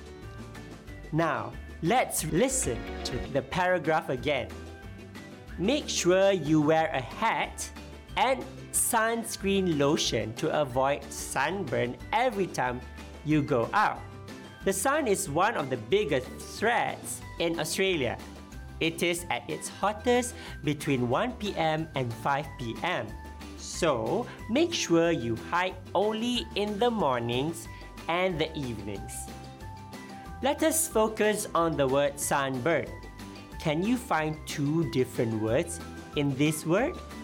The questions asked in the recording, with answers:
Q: Can you find two different words in this word?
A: Yes, we can separate the words sun and burn